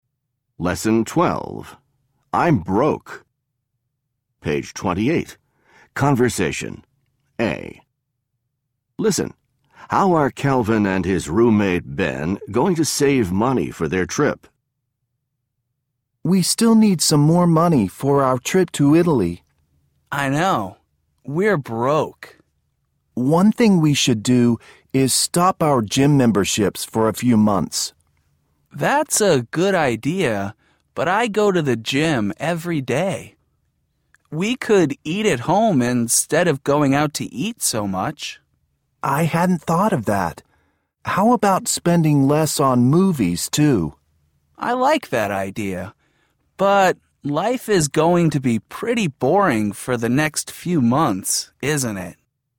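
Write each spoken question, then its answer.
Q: How are Calvin and his roommate Ben going to save money for their trip?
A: By stopping their gym memberships, eating at home instead of going out, and spending less on movies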